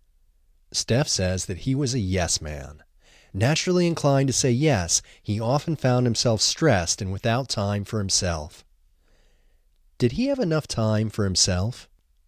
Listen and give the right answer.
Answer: No, he didn't have enough time for himself.